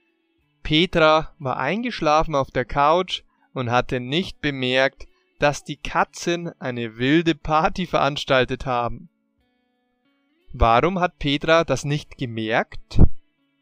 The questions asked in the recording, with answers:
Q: Warum hat Petra das nicht gemerkt?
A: Weil sie eingeschlafen war.